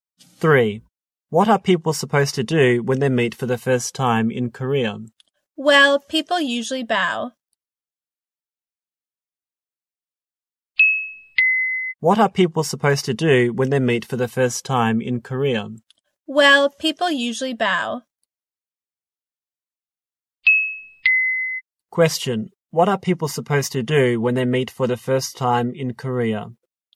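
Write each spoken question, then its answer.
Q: Question. What are people supposed to do when they meet for the first time in Korea?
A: They usually bow.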